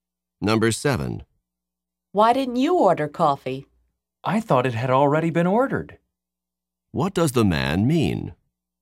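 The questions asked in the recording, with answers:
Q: What does the man mean?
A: He thought someone had already ordered coffee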